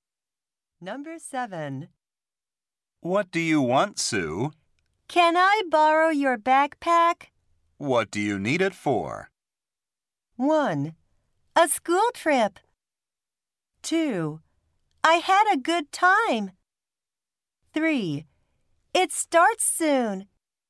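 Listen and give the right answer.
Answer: 1: A school trip.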